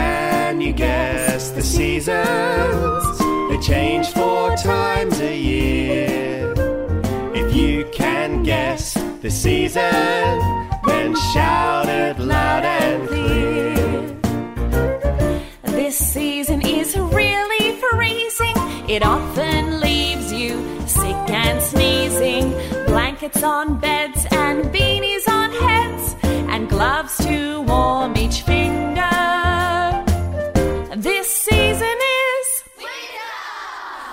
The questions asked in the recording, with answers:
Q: This season is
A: winter.